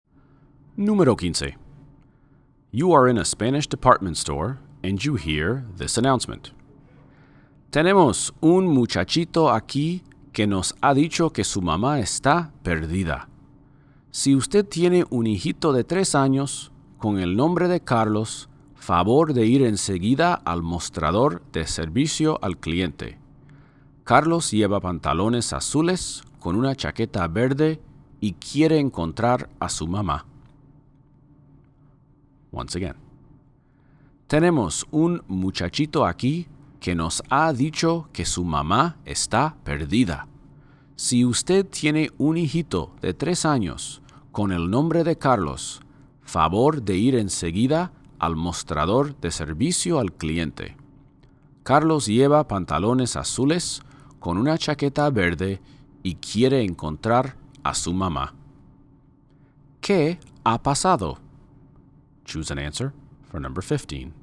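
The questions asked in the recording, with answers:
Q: ¿Qué ha pasado?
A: Un niño de 3 años, Carlos, ha perdido a su mamá en la tienda.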